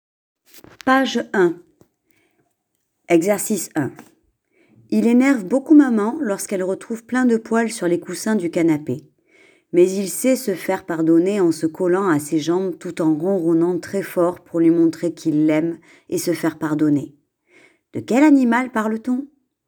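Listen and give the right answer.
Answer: Le chat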